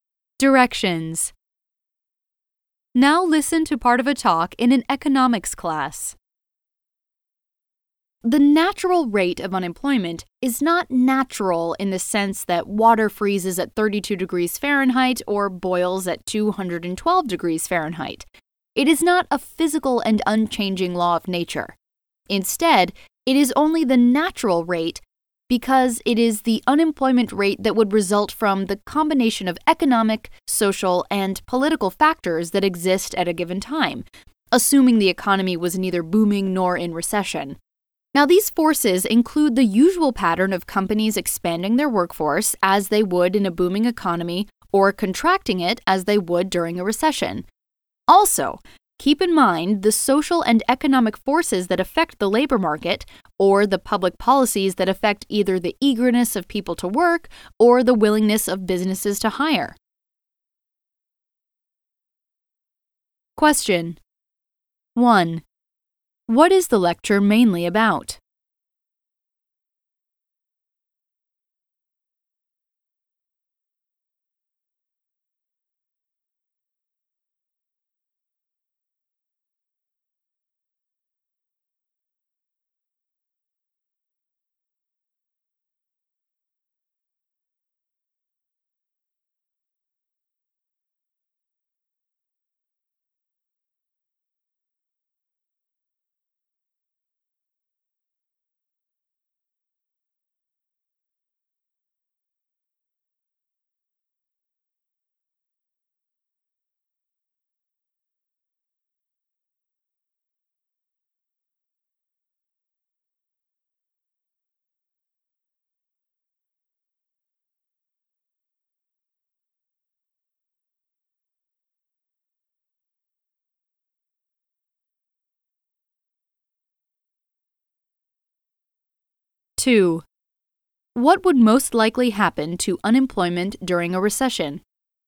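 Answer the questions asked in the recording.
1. The natural rate of unemployment
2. It would rise, as companies cut their workforces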